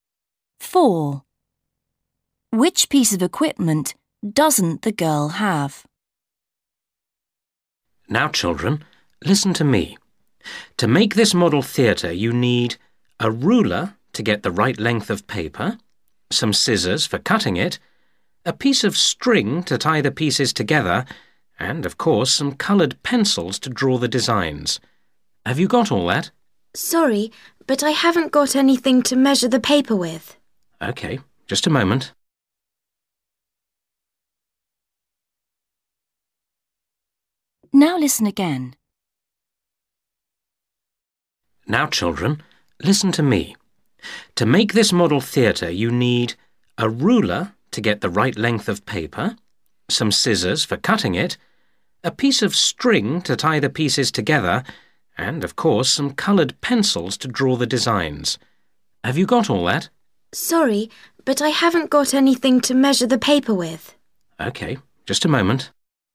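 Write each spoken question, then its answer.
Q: Which piece of equipment doesn't the girl have?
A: a ruler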